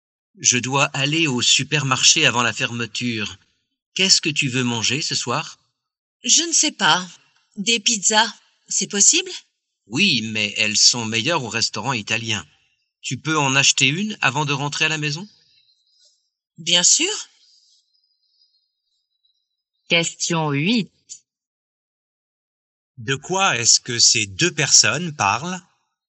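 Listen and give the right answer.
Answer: De ce qu'elles vont manger ce soir (des pizzas)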